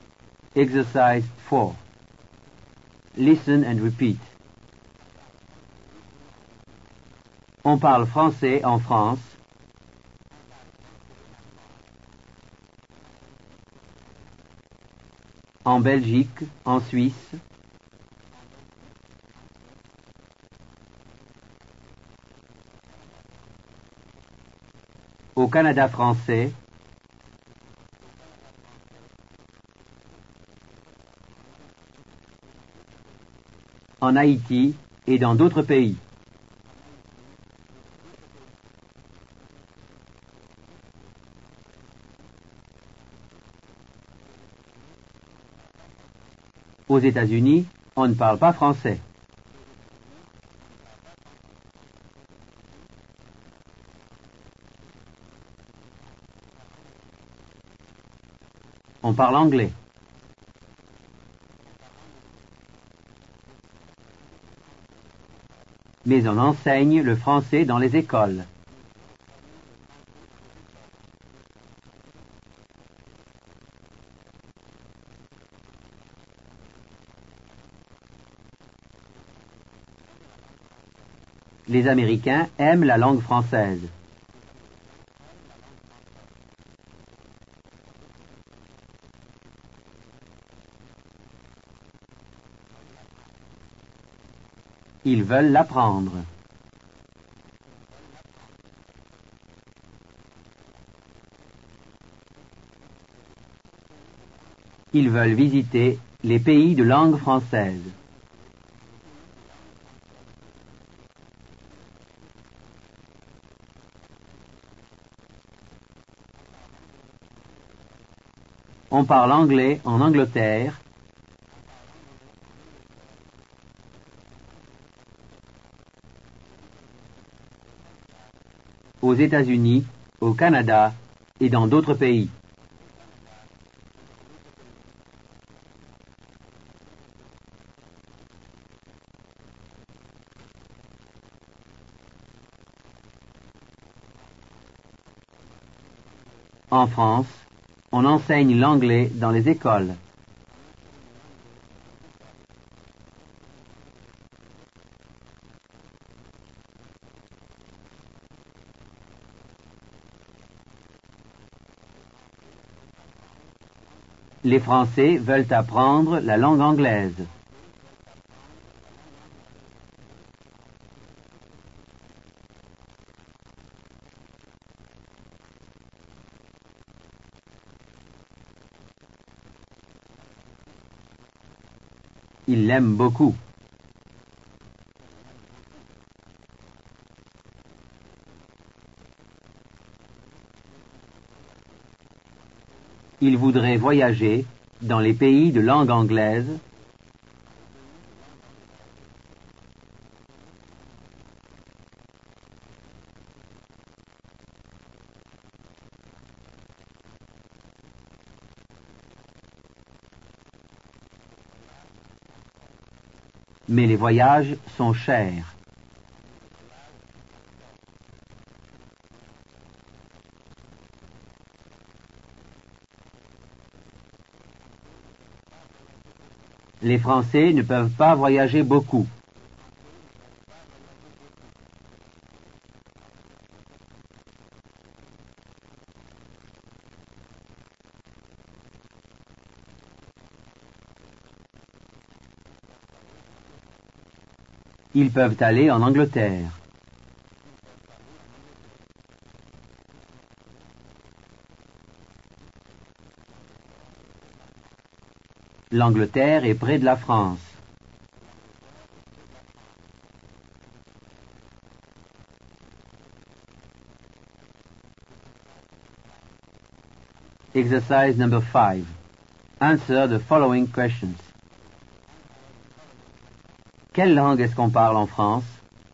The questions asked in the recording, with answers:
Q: Quelle langue est-ce qu'on parle en France?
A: On parle français en France.